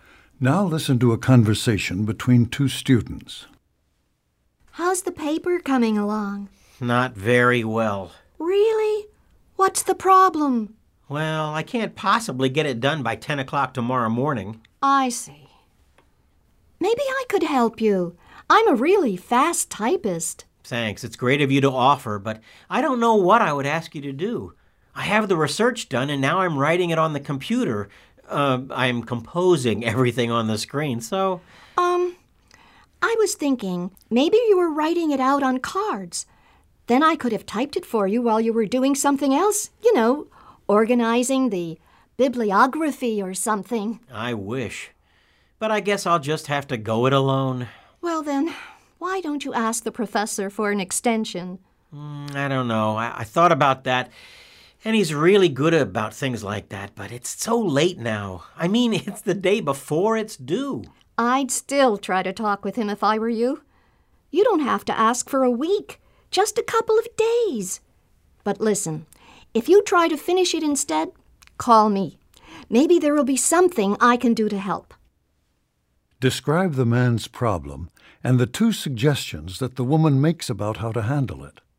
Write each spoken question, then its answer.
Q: Describe the man's problem and the two suggestions that the woman makes about how to handle it.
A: The man has a paper due the next morning, but he doesn't think he can complete it by the deadline. So the woman makes two suggestions. First, she offers to help him type the paper, but he's composing it on the computer, so then she encourages him to ask the professor for an extension.